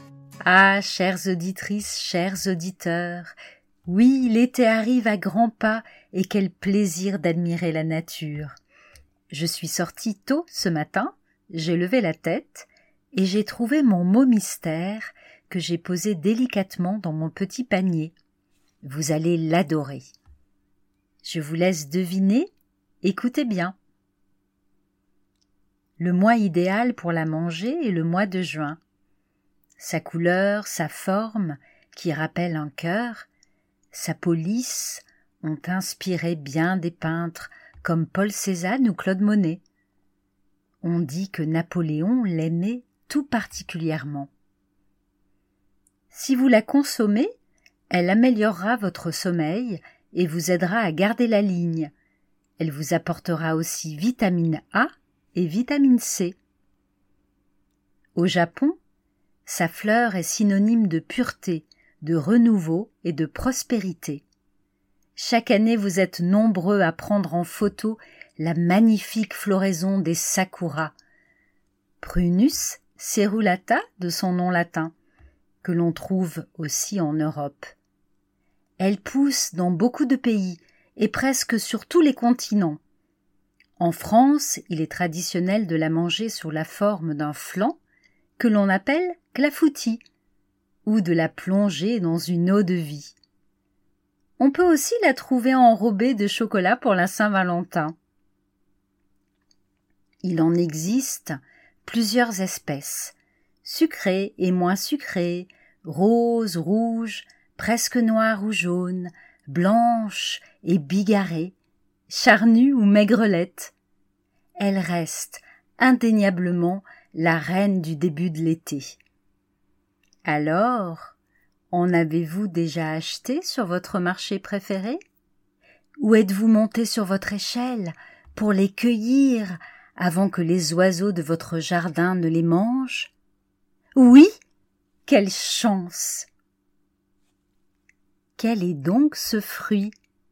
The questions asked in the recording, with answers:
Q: Quel est donc ce fruit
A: La cerise, bien sûr.